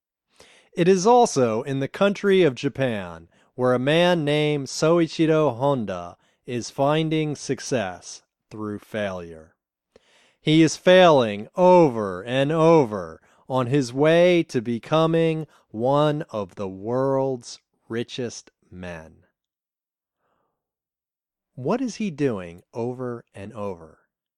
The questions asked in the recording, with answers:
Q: What is he doing over and over?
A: He is failing over and over.